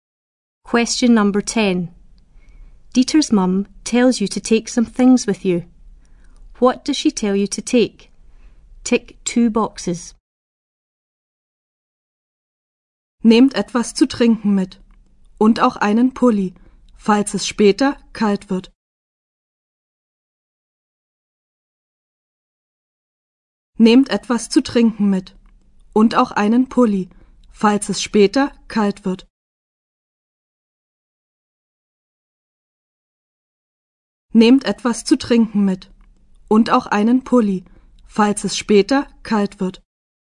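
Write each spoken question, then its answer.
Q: What does she tell you to take?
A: Something to drink and a jumper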